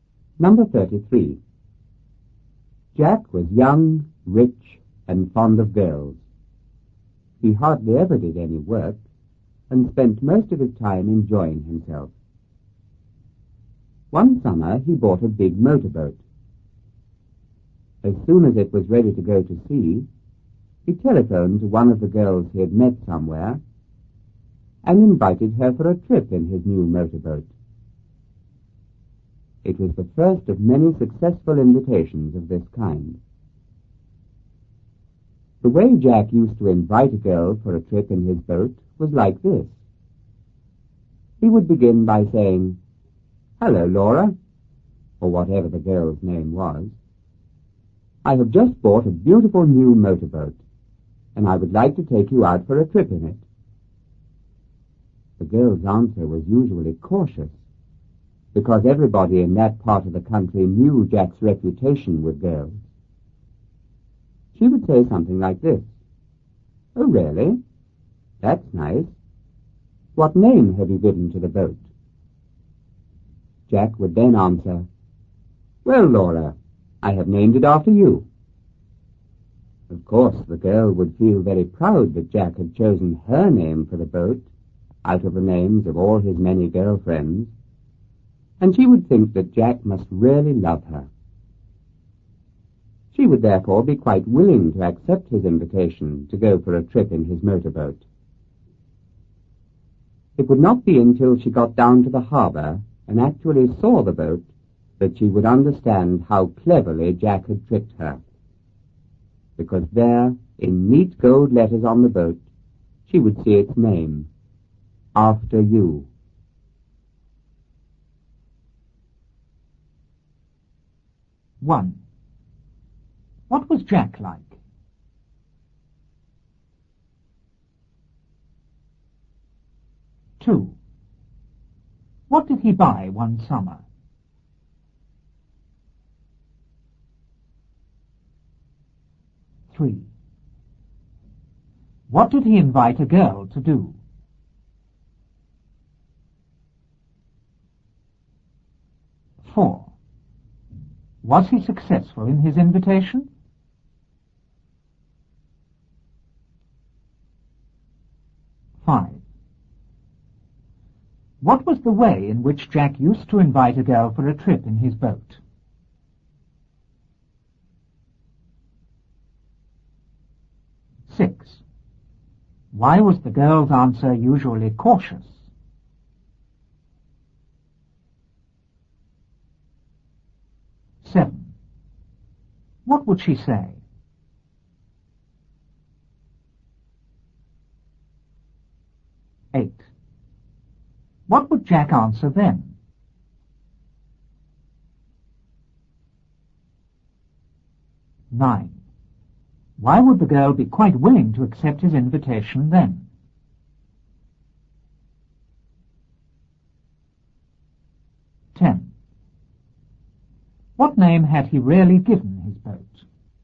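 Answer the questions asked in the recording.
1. Young, rich, and fond of girls
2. A big motorboat
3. Go for a trip in his new motorboat
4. Yes
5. He said he had just bought a beautiful new motorboat and would like to take her out for a trip in it
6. Everybody knew Jack's reputation with girls
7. Oh, really? That's nice. What name have you given to the boat?
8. Well, I have named it after you.
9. She thought he had named the boat after her and must really love her
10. After You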